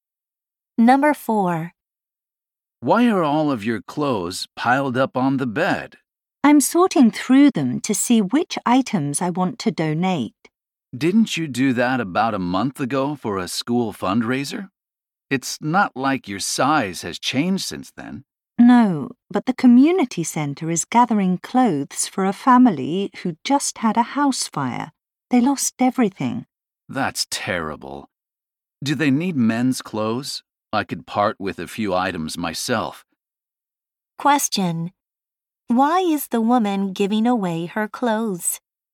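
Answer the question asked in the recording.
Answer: To help a family who lost everything in a house fire.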